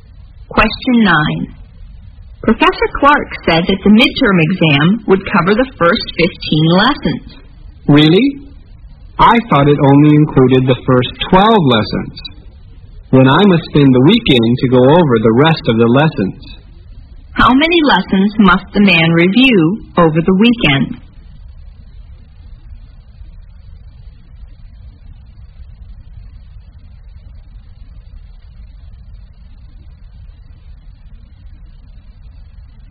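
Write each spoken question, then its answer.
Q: How many lessons must the man review over the weekend?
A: 3 lessons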